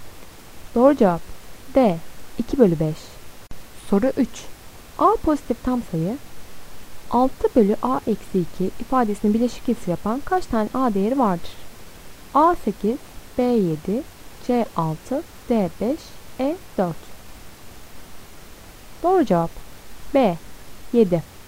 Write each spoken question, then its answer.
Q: A pozitif tam sayı 6 bölü A eksi 2 ifadesinin bileşik kesir yapan kaç tane A değeri vardır?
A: Doğru cevap B 7.